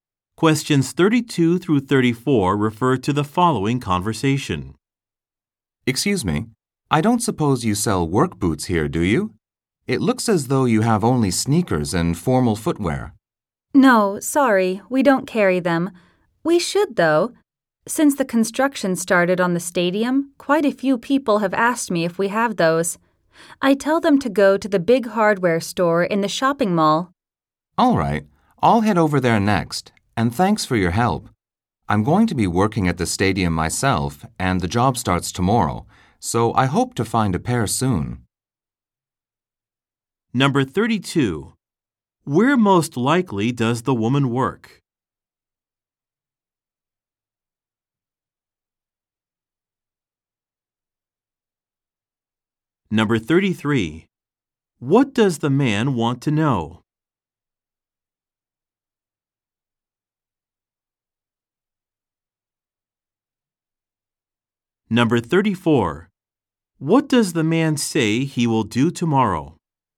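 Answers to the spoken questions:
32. At a shoe store
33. Whether the store sells work boots
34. Start working at the stadium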